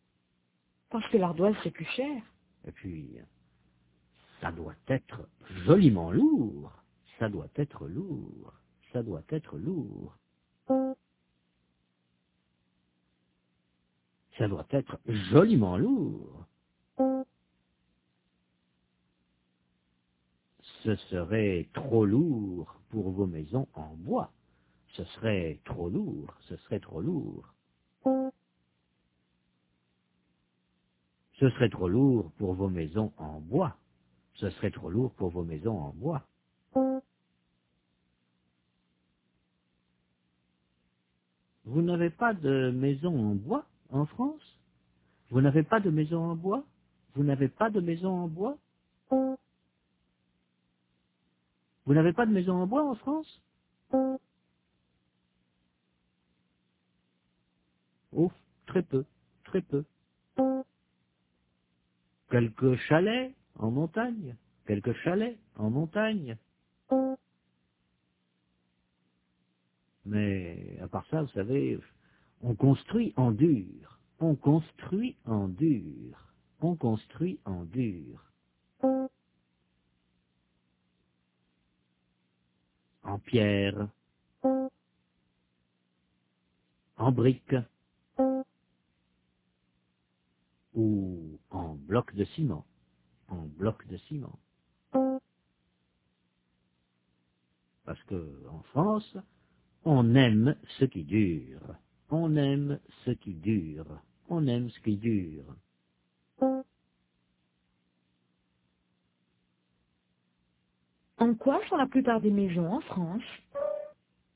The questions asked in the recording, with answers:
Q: En quoi sont la plupart des maisons en France ?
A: En dur, en pierre, en briques ou en blocs de ciment.